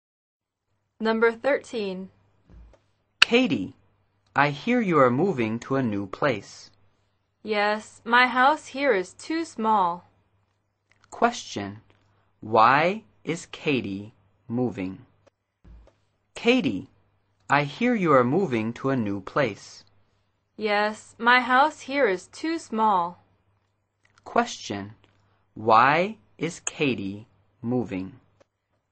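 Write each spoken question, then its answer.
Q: Question. Why is Katie moving?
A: Her house is too small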